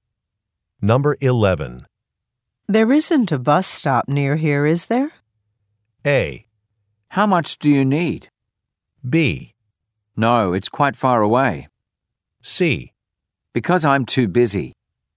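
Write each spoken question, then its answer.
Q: There isn't a bus stop near here, is there?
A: B: No, it's quite far away.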